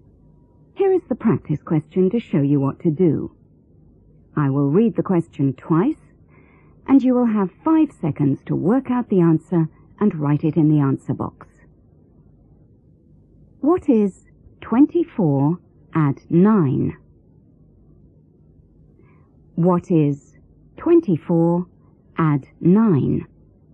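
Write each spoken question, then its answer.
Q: What is 24 add 9?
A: 33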